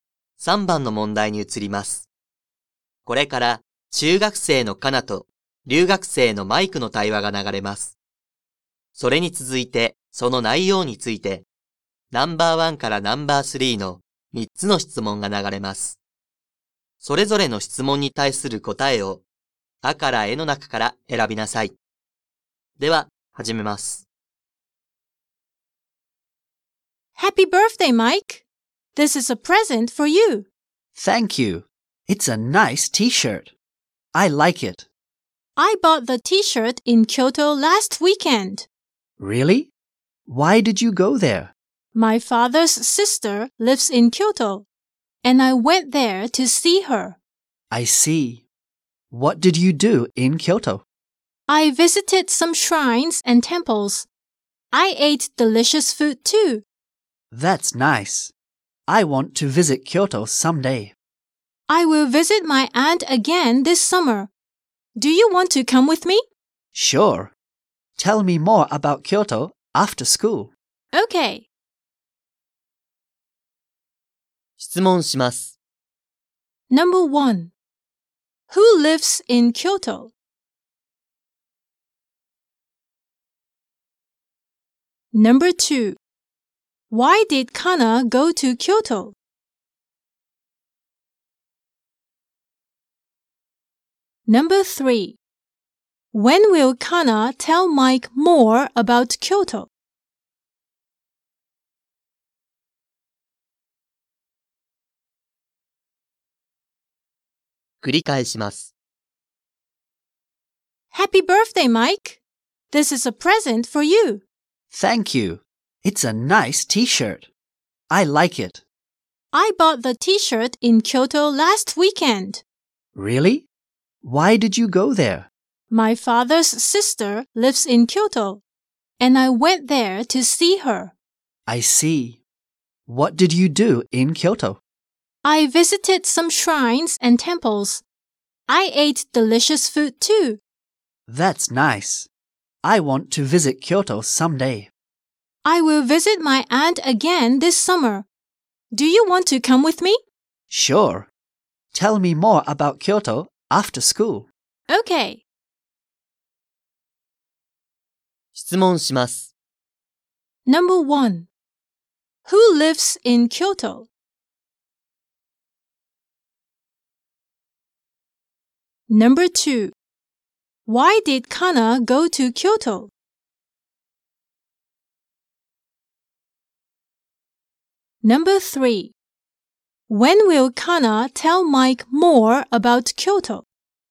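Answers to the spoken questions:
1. Kana's aunt (her father's sister)
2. To see her aunt
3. After school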